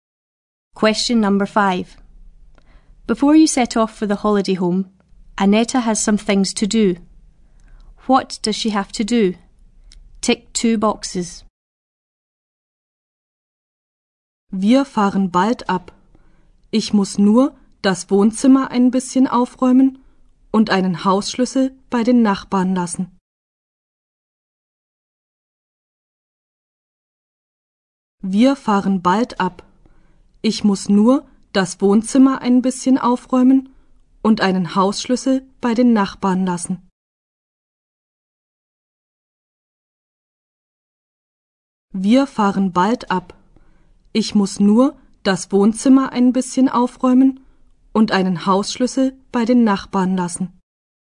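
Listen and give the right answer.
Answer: Tidy the living room; leave a house key with the neighbours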